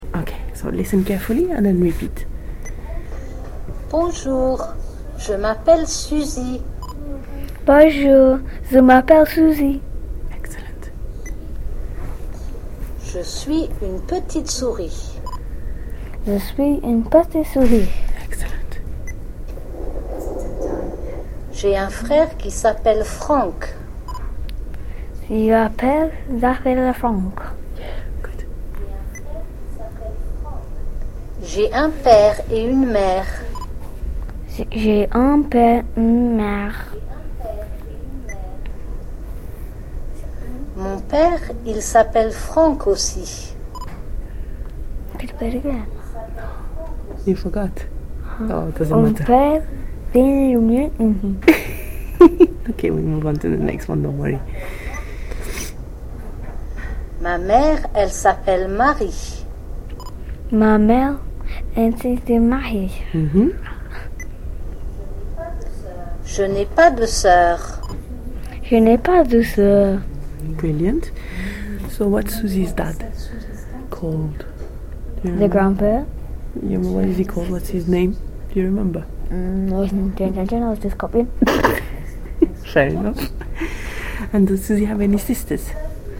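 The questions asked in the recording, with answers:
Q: So what's Susie's dad called?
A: Franck

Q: And does Susie have any sisters?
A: No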